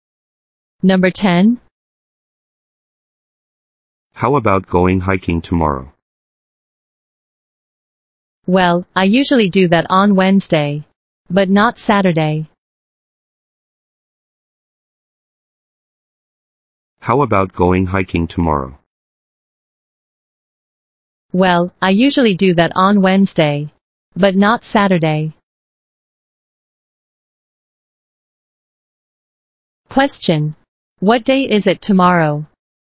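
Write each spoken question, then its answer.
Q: What day is it tomorrow?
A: Saturday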